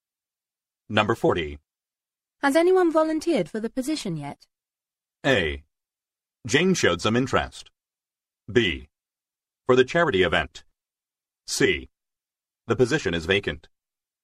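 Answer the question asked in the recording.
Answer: A: Jane showed some interest.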